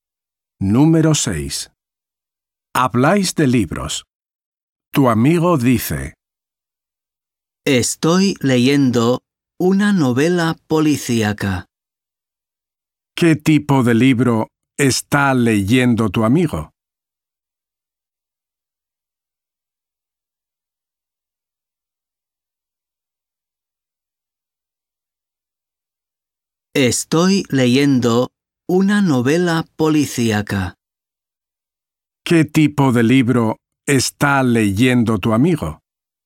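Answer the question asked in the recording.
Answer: una novela policíaca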